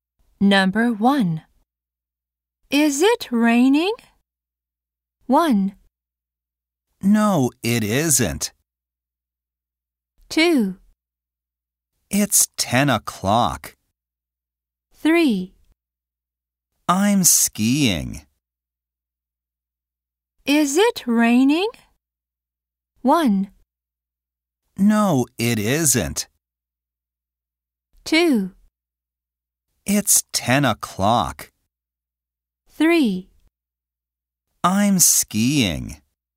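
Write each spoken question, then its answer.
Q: Is it raining?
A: 1: No, it isn't.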